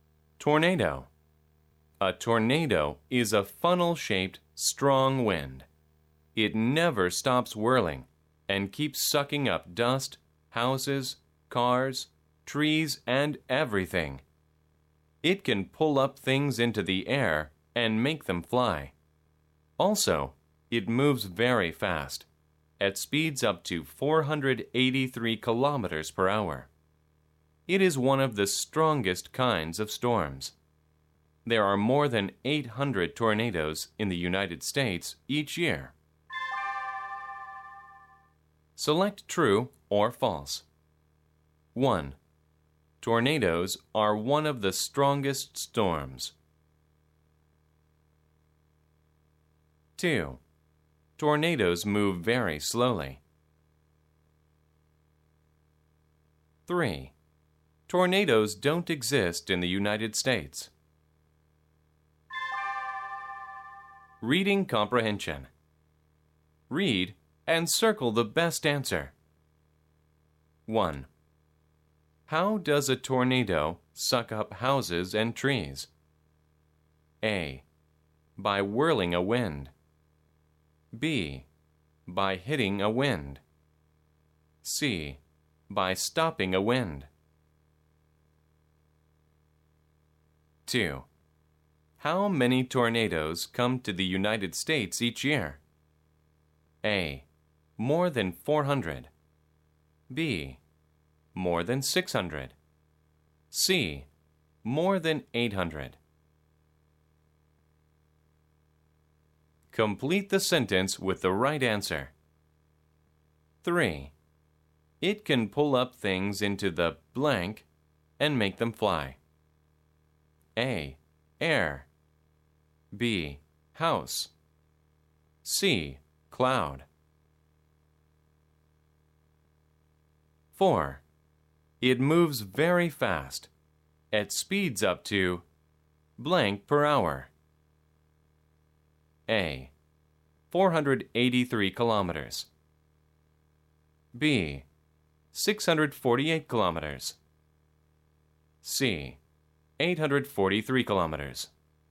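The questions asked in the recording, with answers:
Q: Tornadoes are one of the strongest storms.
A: True

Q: Tornadoes move very slowly.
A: False

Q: Tornadoes don't exist in the United States.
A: False

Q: How does a tornado suck up houses and trees?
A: A: By whirling a wind.

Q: How many tornadoes come to the United States each year?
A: C: More than 800.

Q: It can pull up things into the blank and make them fly.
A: A: Air.

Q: It moves very fast, at speeds up to blank per hour.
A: A: 483 kilometers.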